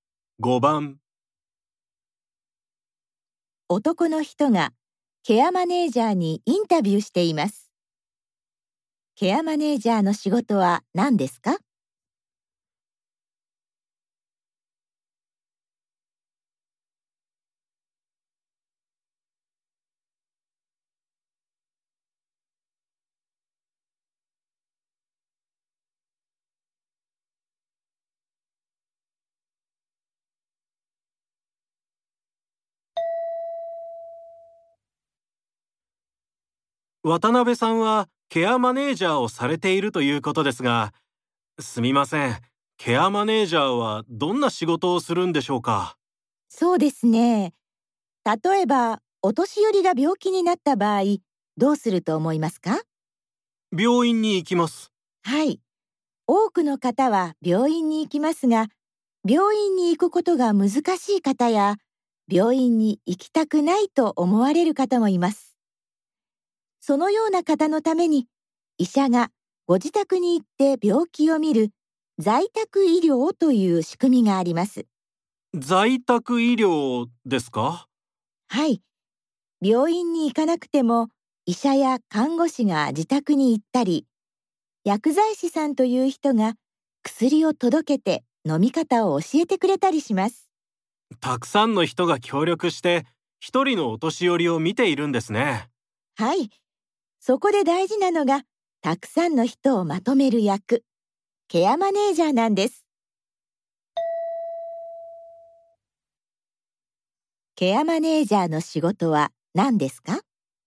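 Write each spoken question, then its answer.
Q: ケアマネージャーの仕事は何ですか?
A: 在宅医療に関わるたくさんの人をまとめること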